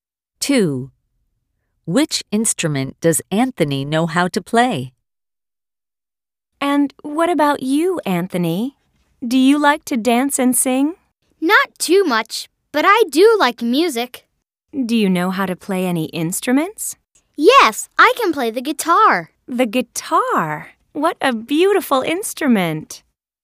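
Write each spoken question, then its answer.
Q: Which instrument does Anthony know how to play?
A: the guitar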